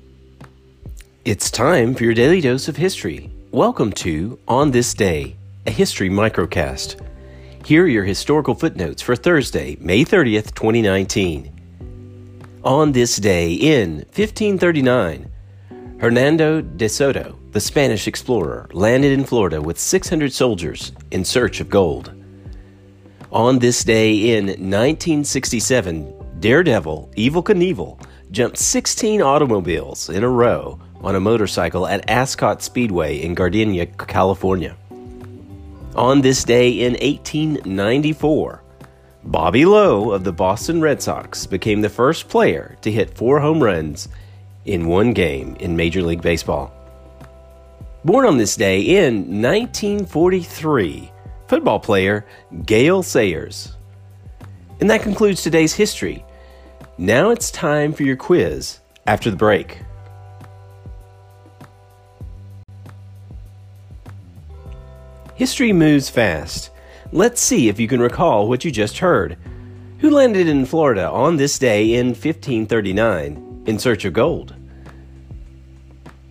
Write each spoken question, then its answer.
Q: Who landed in Florida on this day in 1539 in search of gold?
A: Answer, Hernando de Soto.